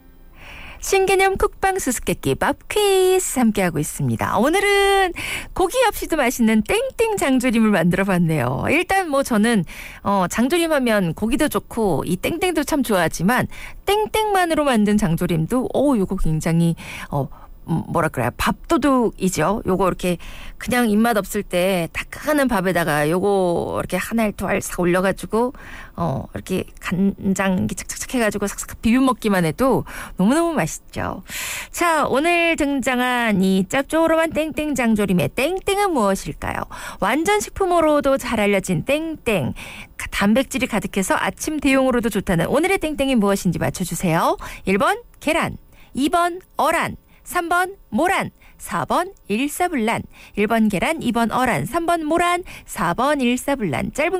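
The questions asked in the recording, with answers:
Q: 자, 오늘 등장한 이 짭조름한 땡땡 장조림의 땡땡은 무엇일까요?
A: 1: 계란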